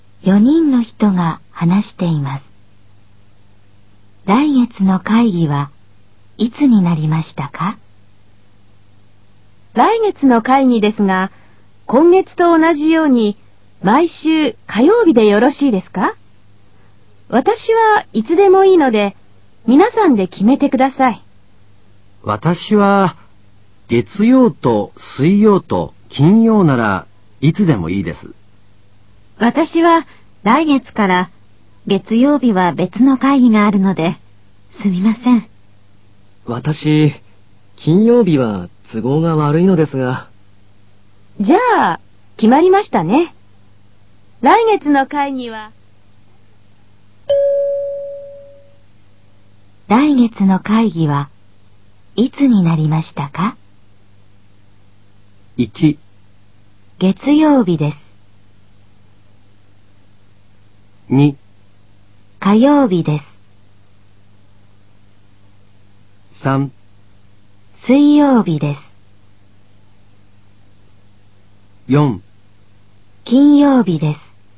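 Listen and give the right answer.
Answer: 3: 水曜日です。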